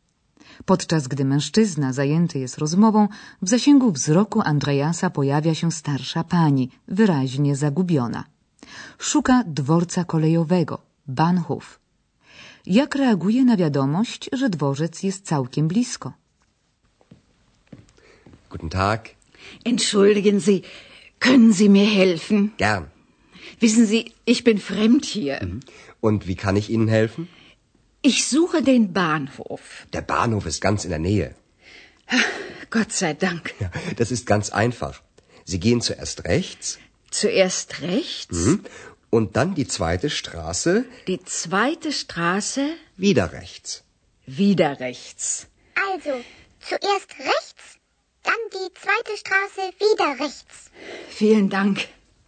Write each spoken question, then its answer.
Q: Jak reaguje na wiadomość, że dworzec jest całkiem blisko?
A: Dzięki Bogu, słyszymy z jej ust.